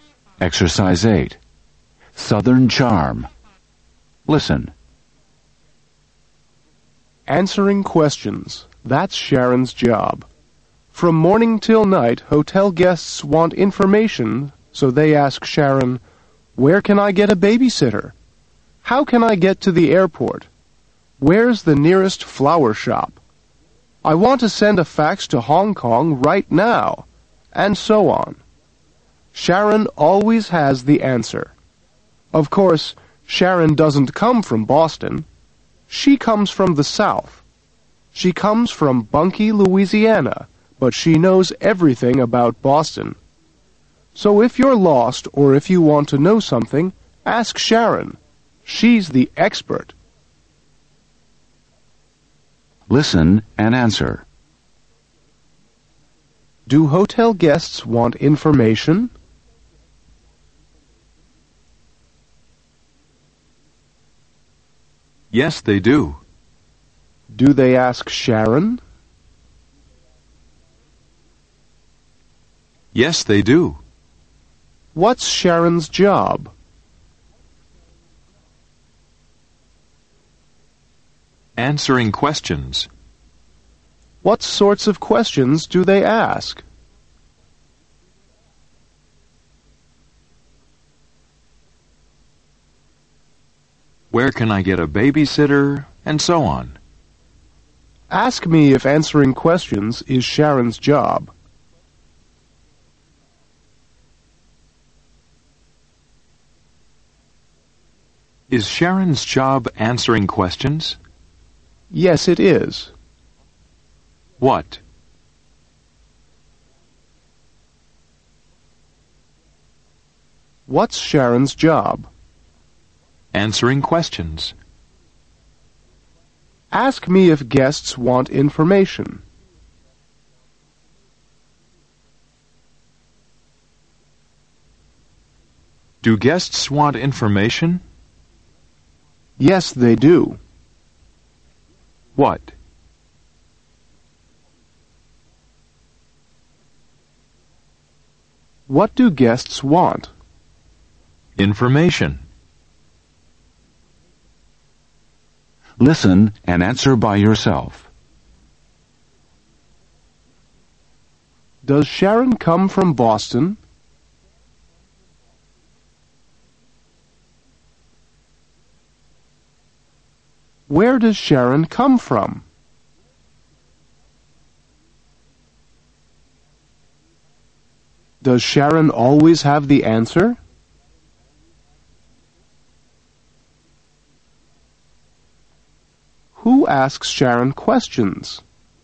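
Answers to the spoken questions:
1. No, she doesn't.
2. The South: Bunky, Louisiana
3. Yes, she does.
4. Hotel guests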